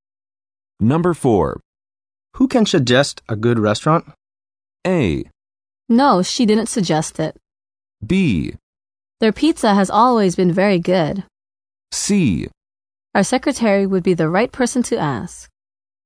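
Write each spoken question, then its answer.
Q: Who can suggest a good restaurant?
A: C: Our secretary would be the right person to ask.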